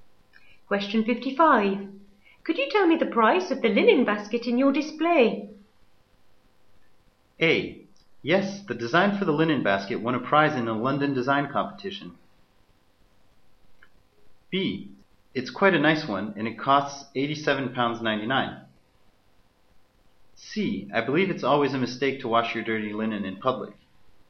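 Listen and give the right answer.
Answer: B: It's quite a nice one, and it costs £87.99.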